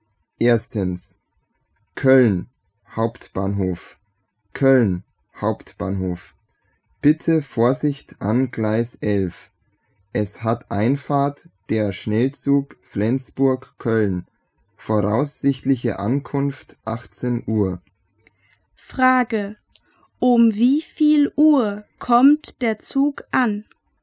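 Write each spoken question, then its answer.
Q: Um wie viel Uhr kommt der Zug an?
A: Um 18 Uhr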